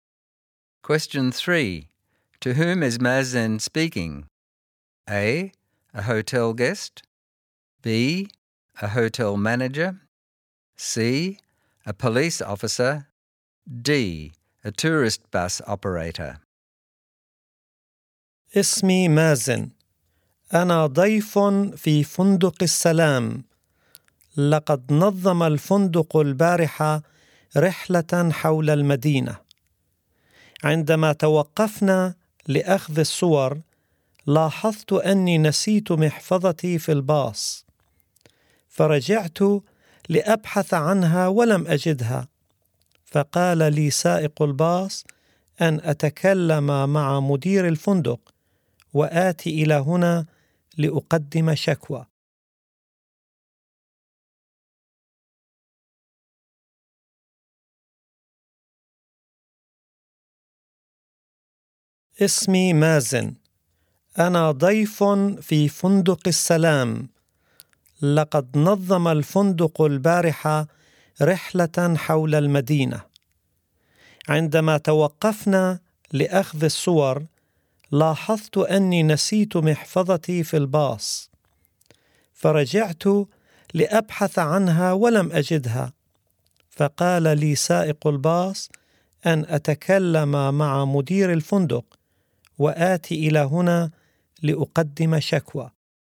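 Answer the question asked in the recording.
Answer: C: a police officer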